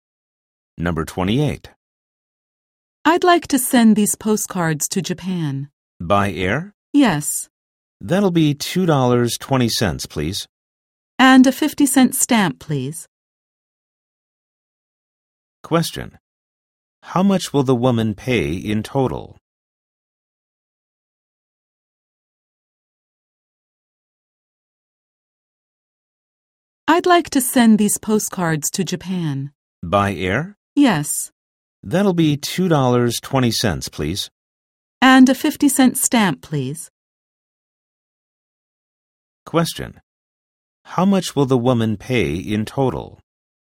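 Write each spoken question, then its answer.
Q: How much will the woman pay in total?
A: $2.70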